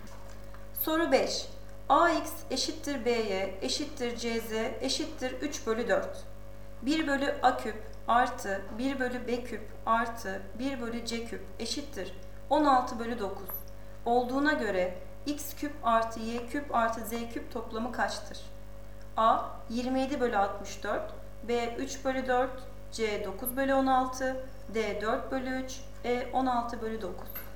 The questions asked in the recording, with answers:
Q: Olduğuna göre X küp artı Y küp artı Z küp toplamı kaçtır?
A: Doğru cevap B 3 bölü 4.